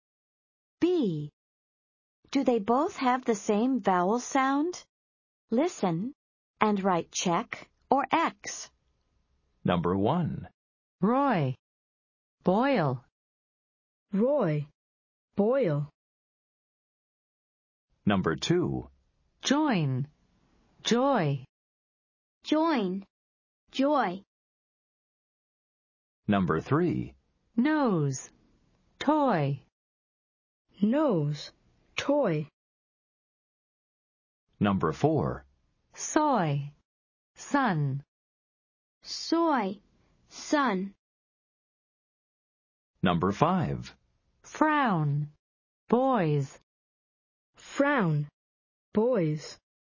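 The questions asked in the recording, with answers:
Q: Do they both have the same vowel sound?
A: Yes (check): Roy, Boil

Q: Do they both have the same vowel sound?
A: Yes (check): Join, Joy

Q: Do they both have the same vowel sound?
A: No (X): Nose, Toy

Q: Do they both have the same vowel sound?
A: No (X): Soy, Sun

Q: Do they both have the same vowel sound?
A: No (X): Frown, Boys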